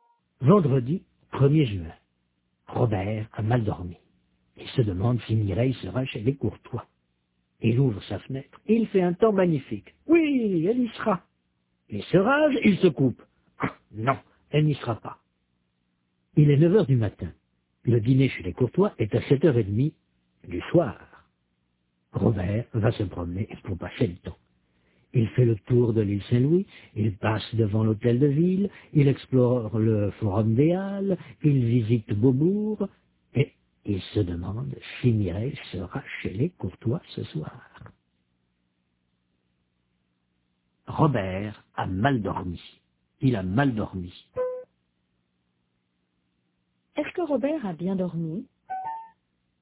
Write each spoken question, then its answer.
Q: Est-ce que Robert a bien dormi?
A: Non, il a mal dormi.